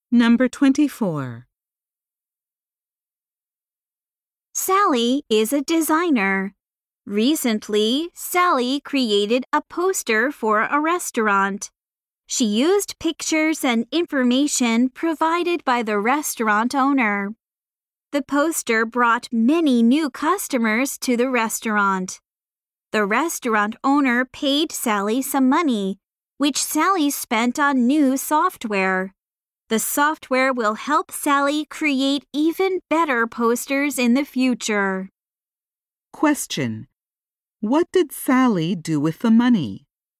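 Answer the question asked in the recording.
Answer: She bought new software.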